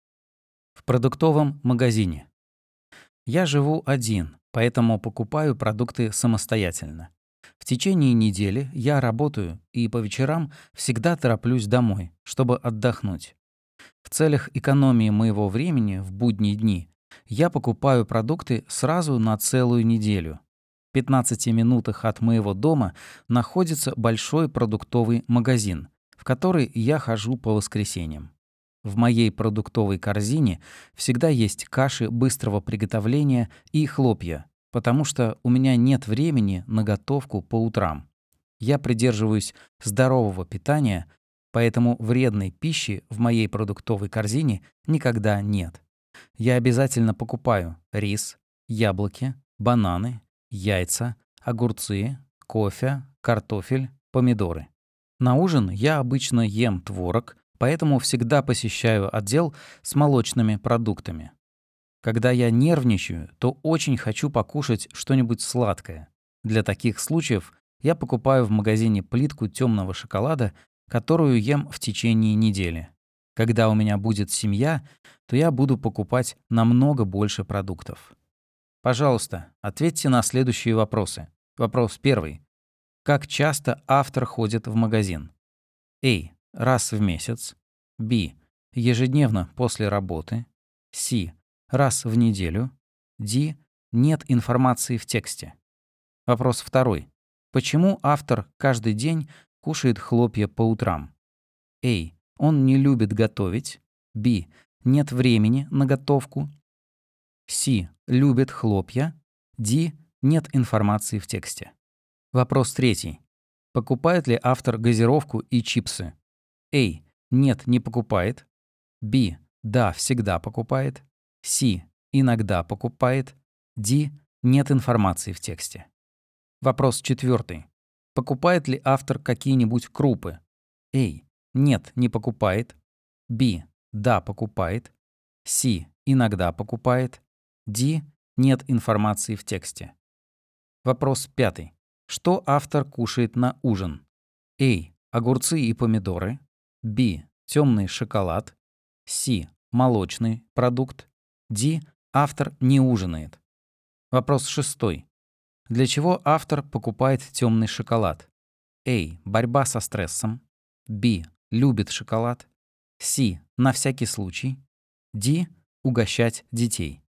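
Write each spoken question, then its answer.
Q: Как часто автор ходит в магазин?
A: C: Раз в неделю.

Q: Почему автор каждый день кушает хлопья по утрам?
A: B: Нет времени на готовку.

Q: Покупает ли автор газировку и чипсы?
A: A: Нет, не покупает.

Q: Покупает ли автор какие-нибудь крупы?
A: B: Да, покупает.

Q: Что автор кушает на ужин?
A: C: Молочный продукт.

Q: Для чего автор покупает темный шоколад?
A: A: Борьба со стрессом.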